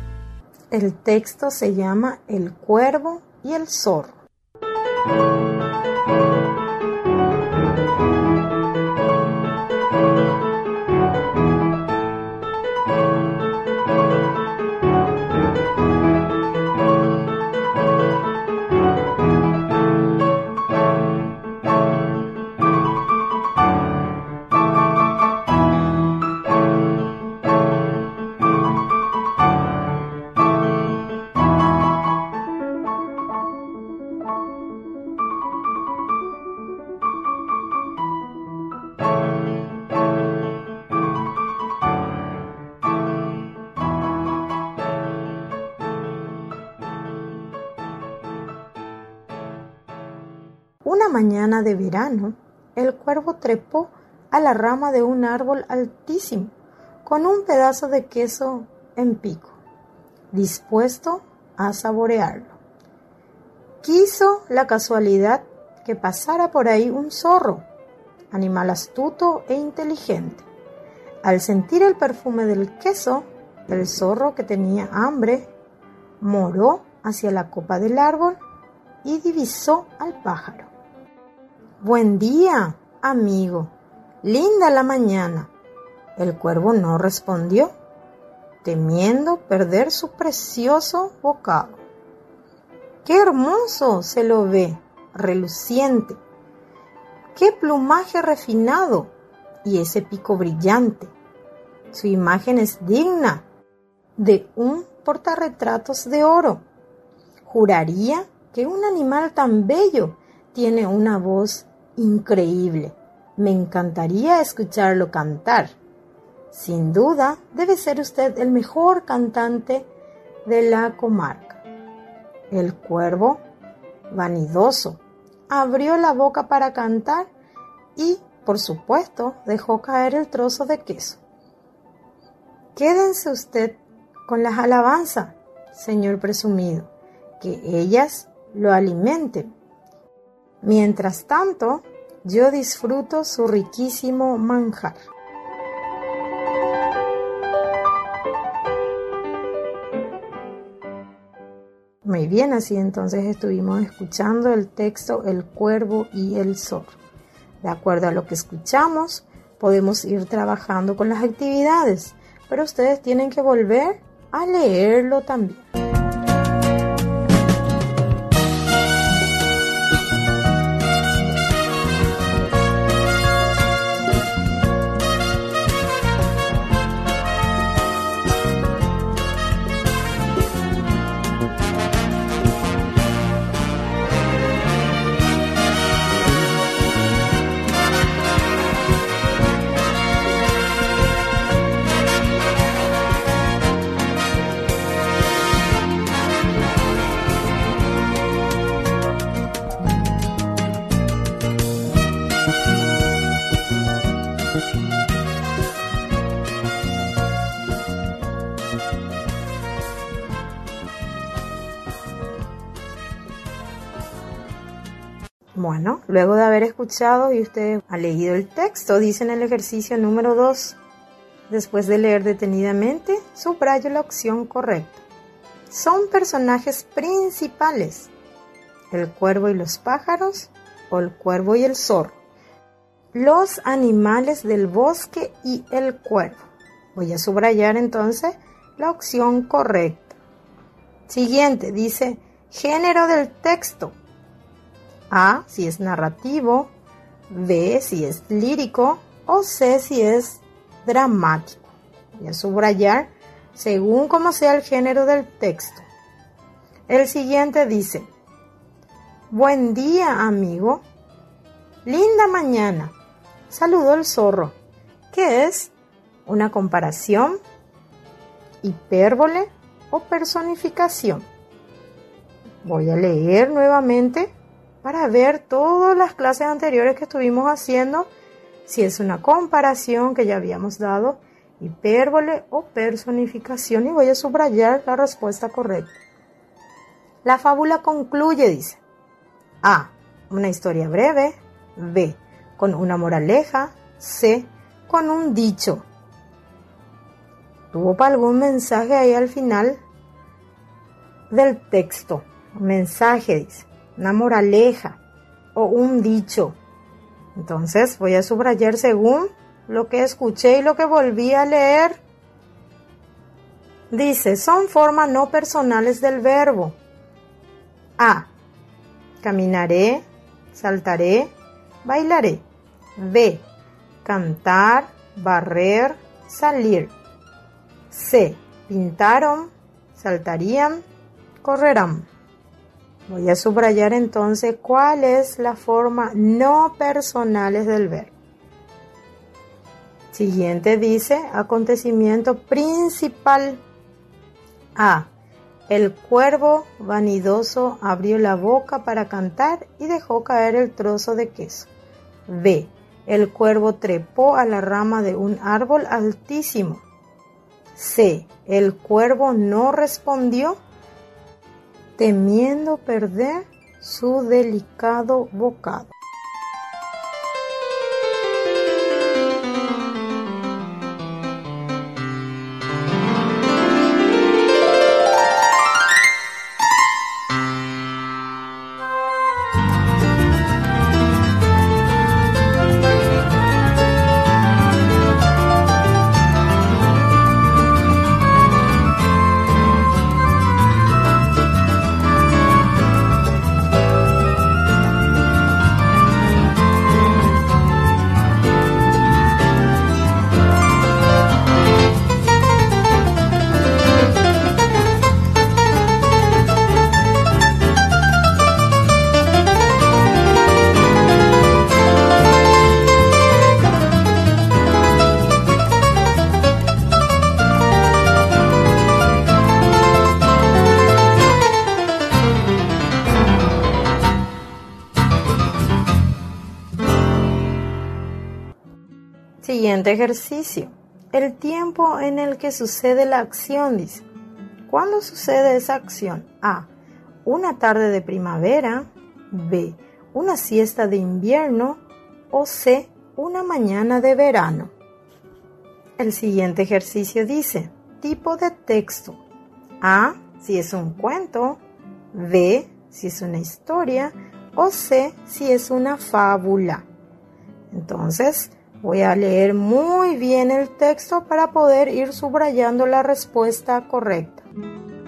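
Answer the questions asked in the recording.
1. el cuervo y el zorro
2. A: narrativo
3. personificación
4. B: con una moraleja
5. B: cantar, barrer, salir
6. A: El cuervo vanidoso abrió la boca para cantar y dejó caer el trozo de queso
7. C: Una mañana de verano
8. ilustro lo que más me agradó de la fábula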